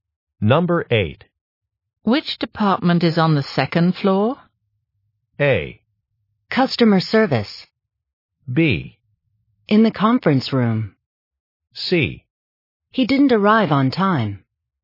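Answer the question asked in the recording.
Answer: A: Customer service.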